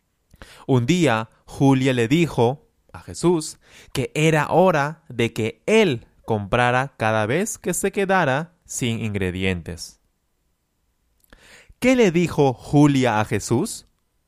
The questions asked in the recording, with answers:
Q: ¿Qué le dijo Julia a Jesús?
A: Julia le dijo, es hora de que compres tú cada vez que te quedes sin ingredientes.